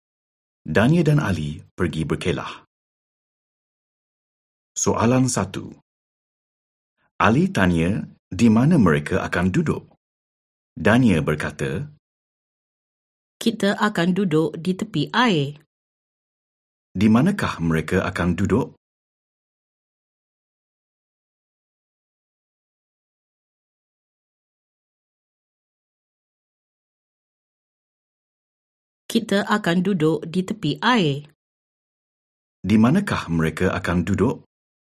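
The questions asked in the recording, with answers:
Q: Di manakah mereka akan duduk?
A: Di tepi air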